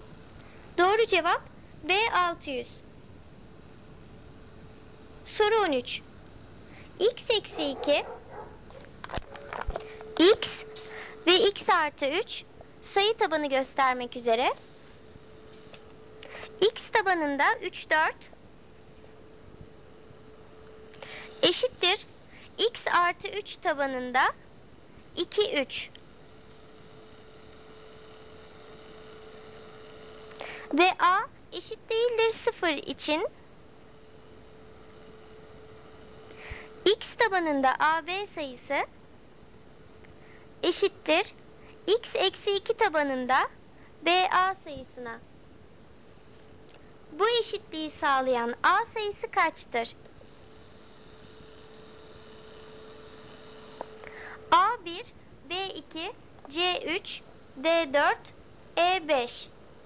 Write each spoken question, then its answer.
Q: Bu eşitliği sağlayan A sayısı kaçtır?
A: Doğru cevap A1.